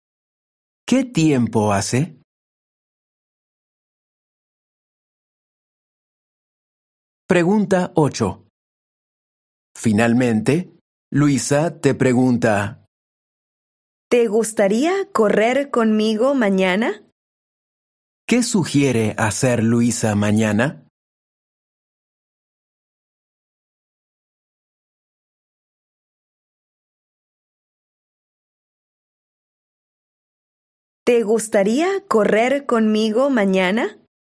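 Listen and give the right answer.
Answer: correr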